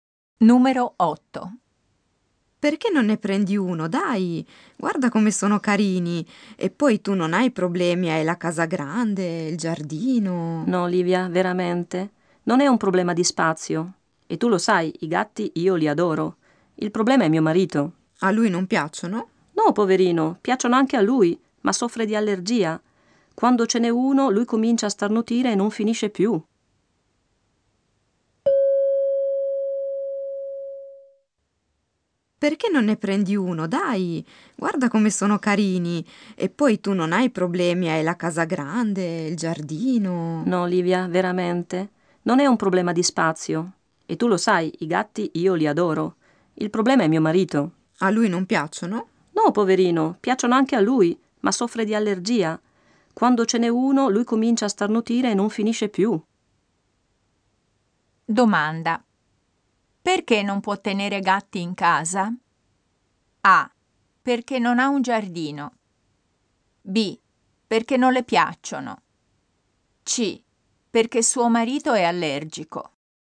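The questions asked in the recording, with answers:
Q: Perché non può tenere gatti in casa?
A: C: Perché suo marito è allergico.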